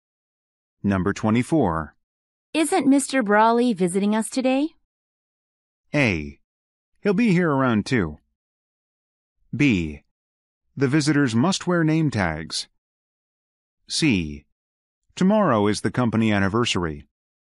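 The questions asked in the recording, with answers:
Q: Isn't Mr. Brawley visiting us today?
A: A: He'll be here around 2.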